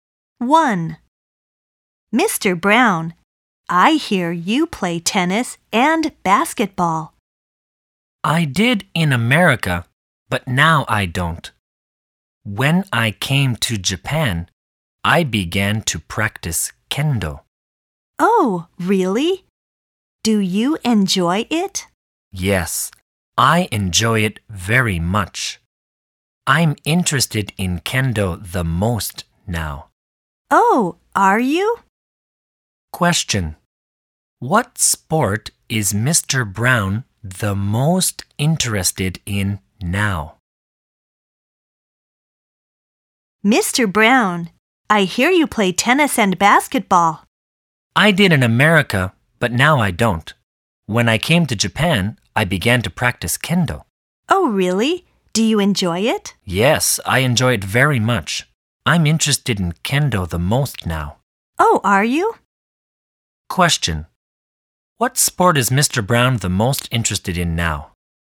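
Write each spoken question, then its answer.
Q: What sport is Mr. Brown the most interested in now?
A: Kendo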